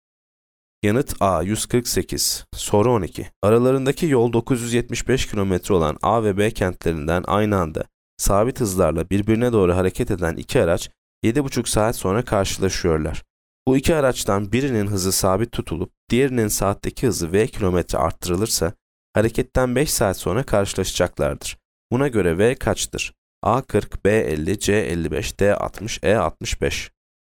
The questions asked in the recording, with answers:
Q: Buna göre v kaçtır?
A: Yanıt E 65.